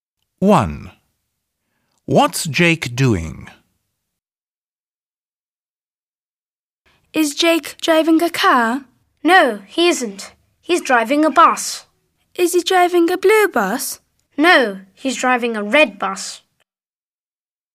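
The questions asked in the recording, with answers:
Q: What's Jake doing?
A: He's driving a red bus.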